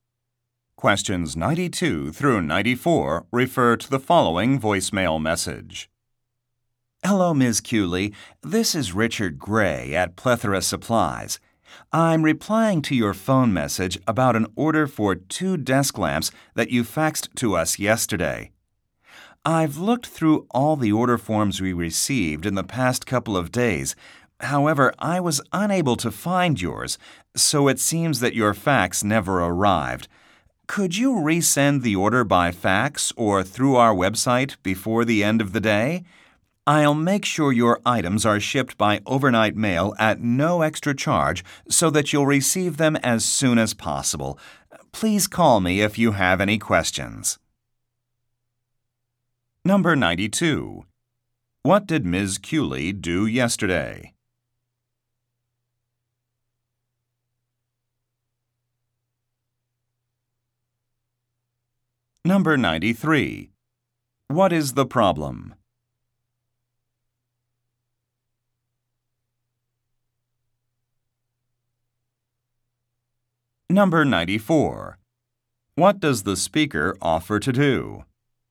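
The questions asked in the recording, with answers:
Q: What did Ms. Cooley do yesterday?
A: Faxed an order for 2 desk lamps

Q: What is the problem?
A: Her fax never arrived

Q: What does the speaker offer to do?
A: Ship the items overnight at no extra charge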